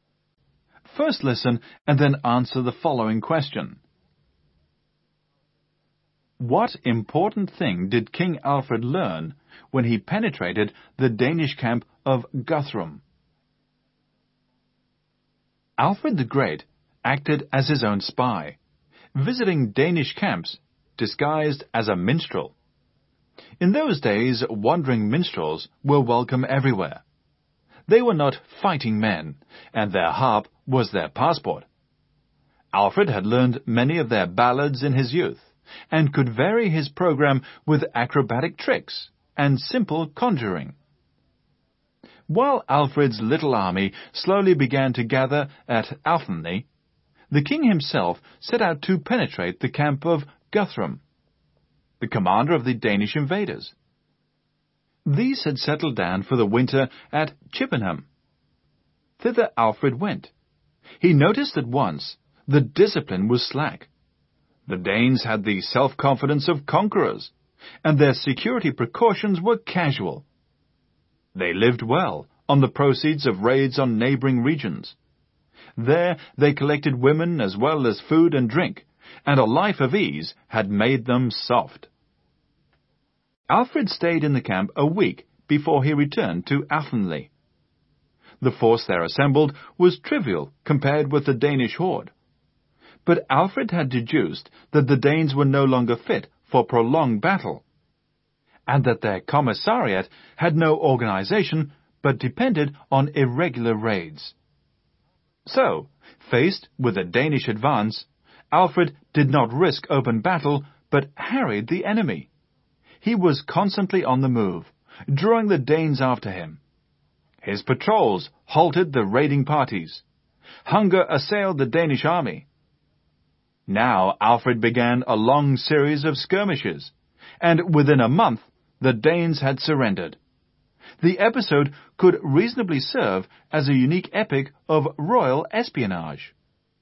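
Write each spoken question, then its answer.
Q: What important thing did King Alfred learn when he penetrated the Danish camp of Guthrum?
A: That the Danes were no longer fit for prolonged battle and their supplies depended on irregular raids, with no organization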